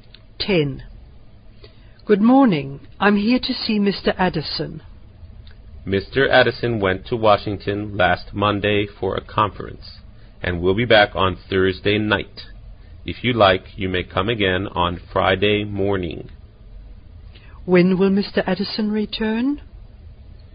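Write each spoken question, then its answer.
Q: When will Mr. Addison return?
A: On Thursday night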